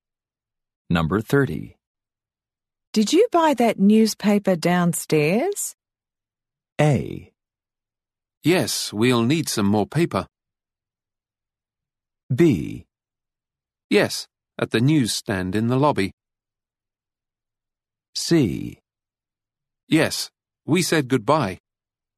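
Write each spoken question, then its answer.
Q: Did you buy that newspaper downstairs?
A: B: Yes, at the newsstand in the lobby.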